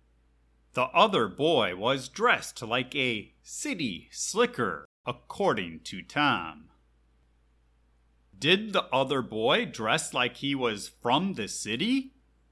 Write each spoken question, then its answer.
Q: Did the other boy dress like he was from the city?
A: Yes, the other boy was dressed up all fancy, like he was from the city.